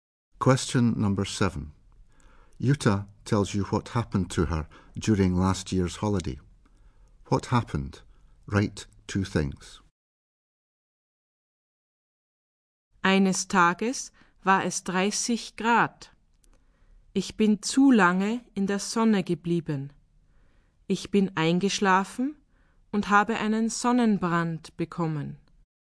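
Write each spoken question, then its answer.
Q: What happened? Write two things.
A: She stayed too long in the sun, fell asleep and got sunburnt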